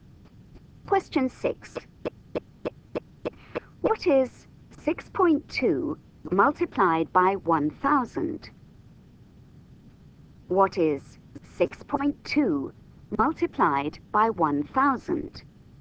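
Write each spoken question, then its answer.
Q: What is 6.2 multiplied by 1,000?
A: 6,200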